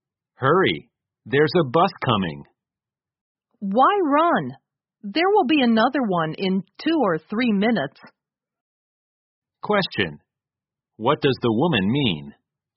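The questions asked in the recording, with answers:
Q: What does the woman mean?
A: There's no need to hurry; another bus will come in 2 or 3 minutes.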